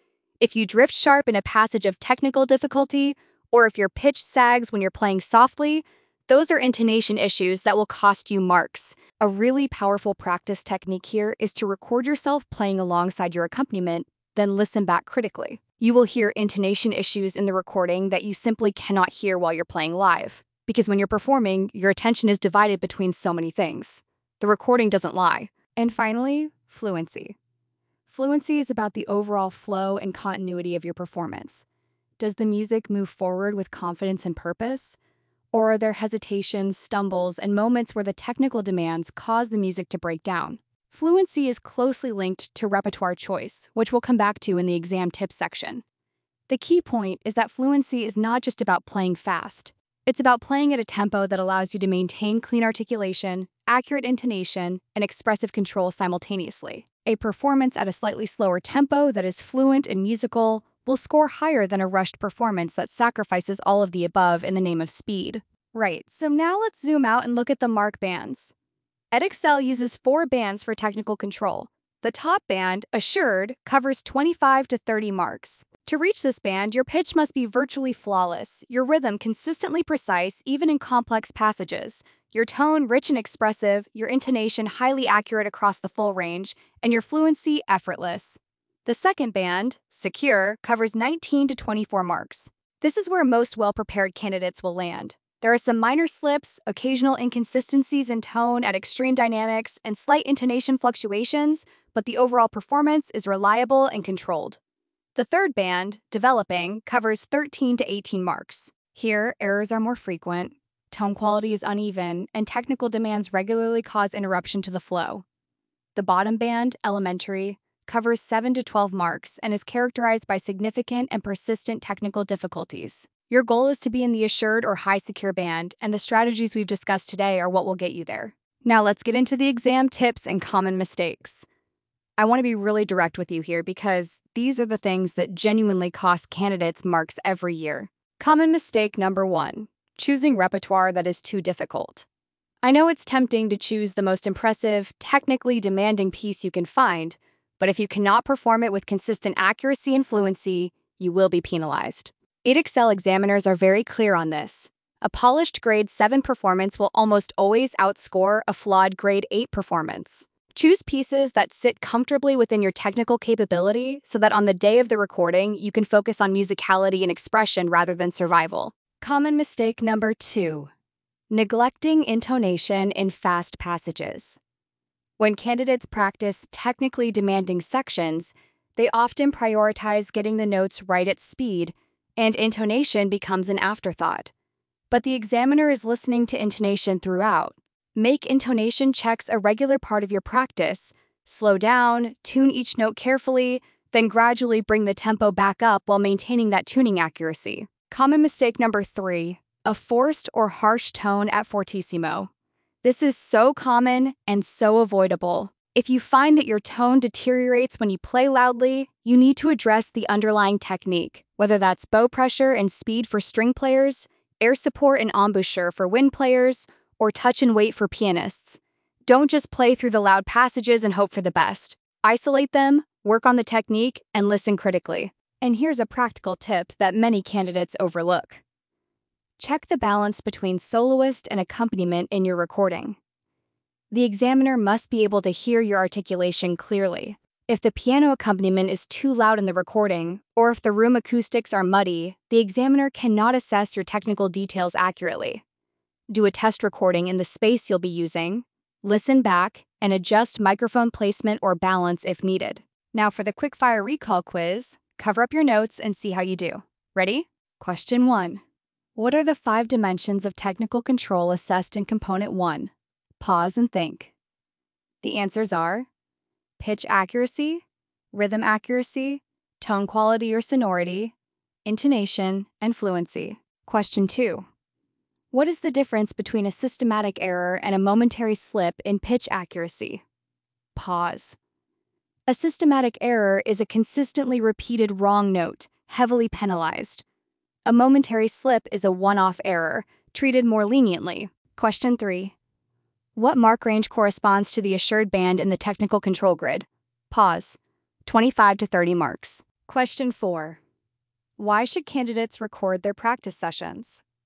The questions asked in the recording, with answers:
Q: Why should candidates record their practice sessions?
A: Because intonation issues and tonal inconsistencies are much easier to hear in a recording than when playing live, as attention is divided during performance.